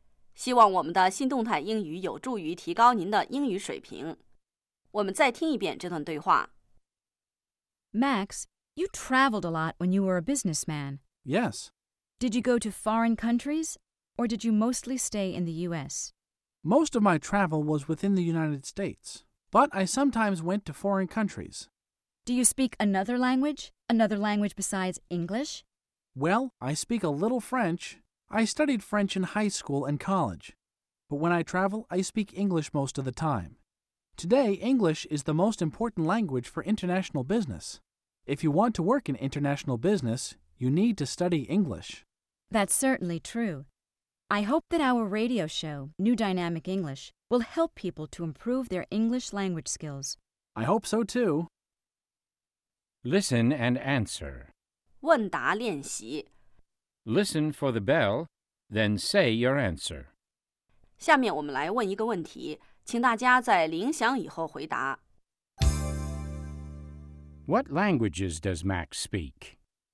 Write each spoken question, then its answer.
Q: What languages does Max speak?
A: He speaks English and a little French.